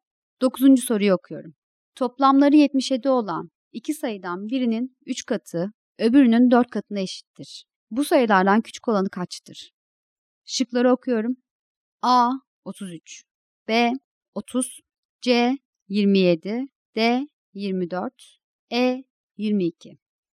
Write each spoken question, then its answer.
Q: Bu sayılardan küçük olanı kaçtır?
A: Doğru cevap A şıkkı.